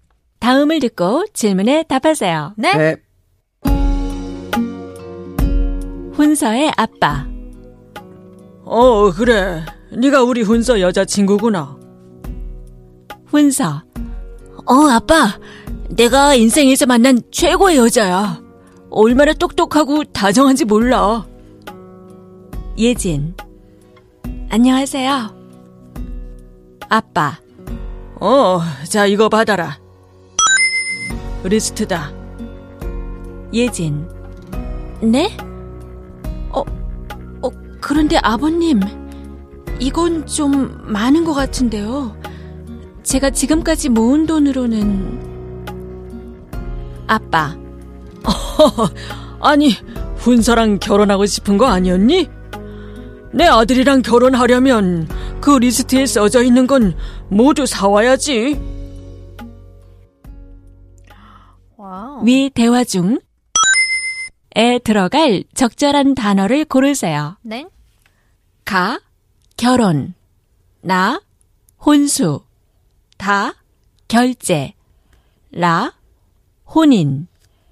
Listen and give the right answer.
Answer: So the answer is 혼수 list.